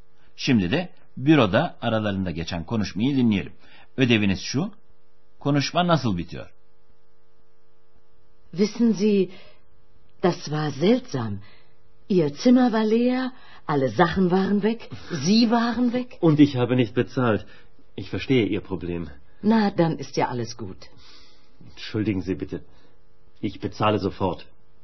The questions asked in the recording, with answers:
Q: Ödeviniz şu, konuşma nasıl bitiyor?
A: Bay Mayer hemen ödeyeceğini söyledi.